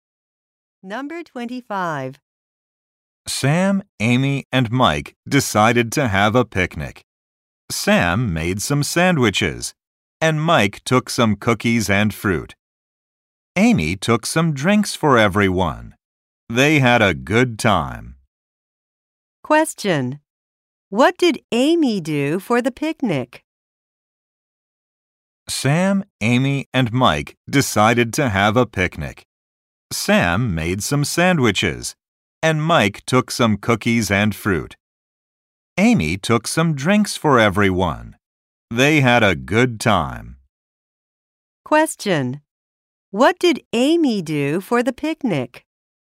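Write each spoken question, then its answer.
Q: What did Amy do for the picnic?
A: She took drinks for everyone.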